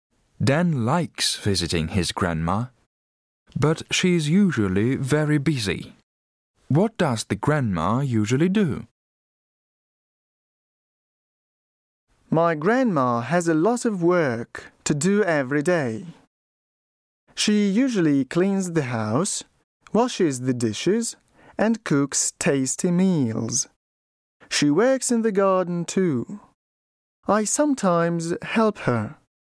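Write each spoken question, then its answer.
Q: What does the grandma usually do?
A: She cleans the house, washes the dishes, cooks tasty meals and works in the garden.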